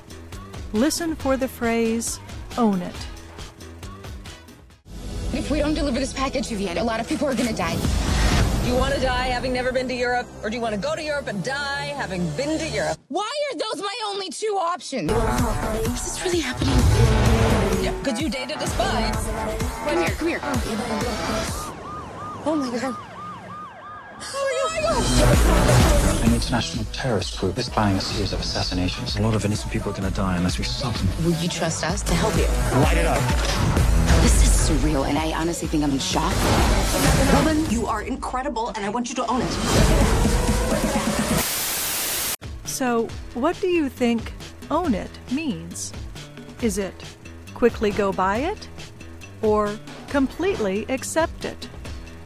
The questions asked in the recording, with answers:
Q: So, what do you think own it means?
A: Own it means completely accept it.